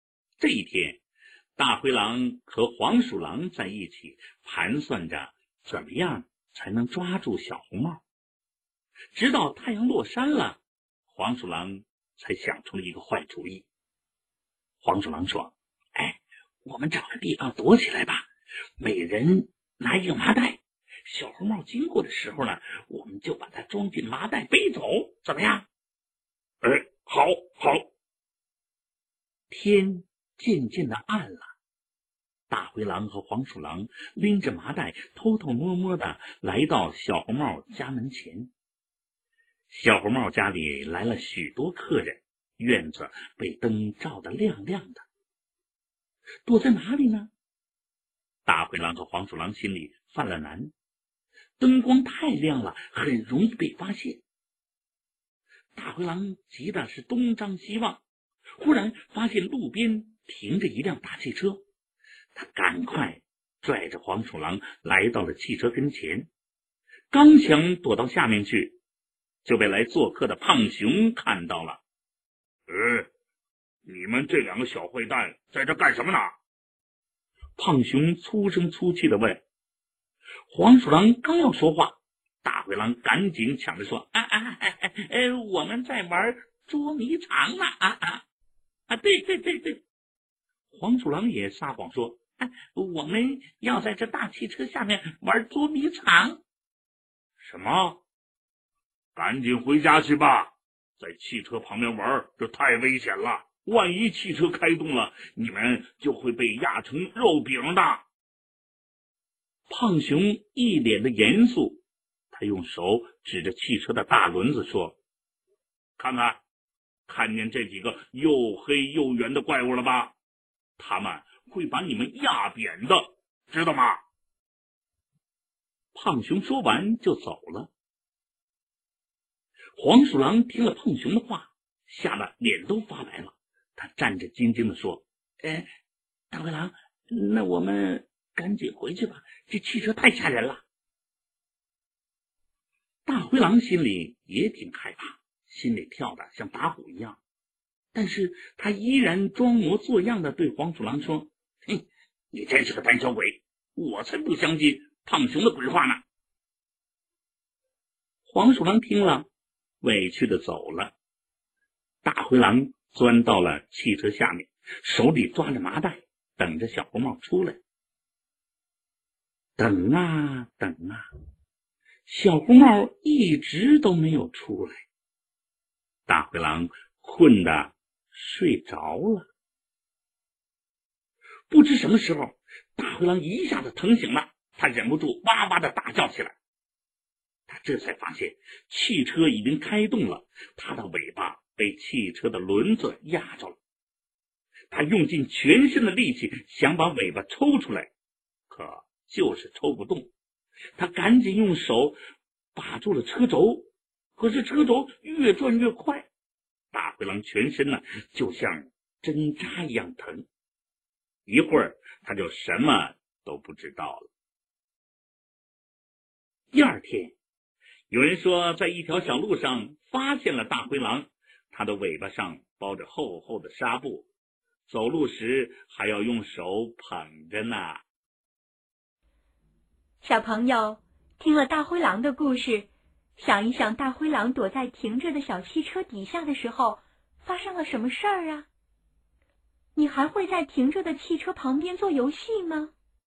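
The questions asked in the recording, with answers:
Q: 想一想大灰狼躲在停着的小汽车底下的时候发生了什么事儿啊?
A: 他睡着了,汽车开动后,他的尾巴被车轮压住,受了伤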